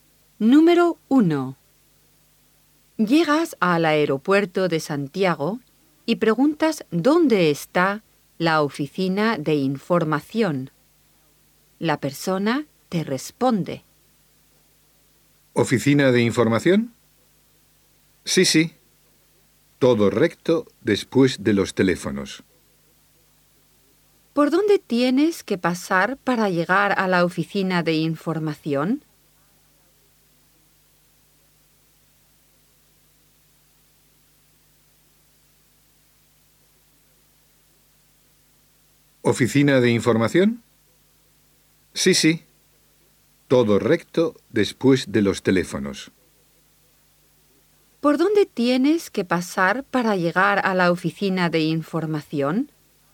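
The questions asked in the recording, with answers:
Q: ¿Por dónde tienes que pasar para llegar a la oficina de información?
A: Todo recto, pasando por los teléfonos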